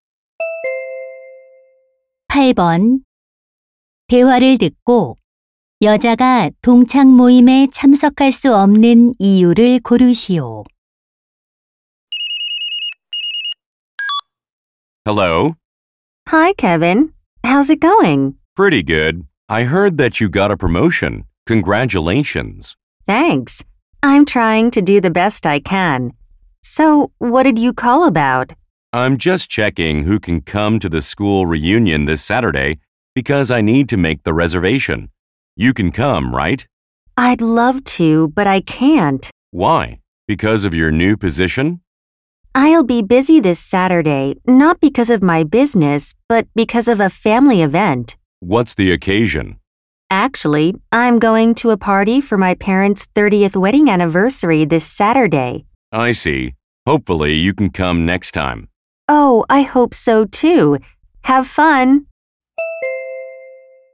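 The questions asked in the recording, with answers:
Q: 8번대화를듣고여자가동창모임에참석할수없는이유를고르시오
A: 부모님 결혼 30주년 기념 파티에 가야 해서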